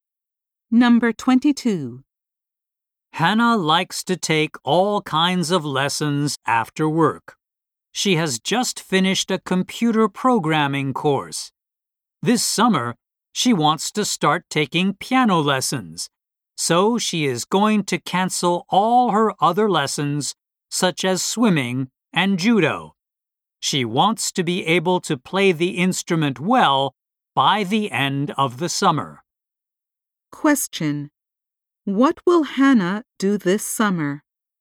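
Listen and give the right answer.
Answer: Start taking piano lessons.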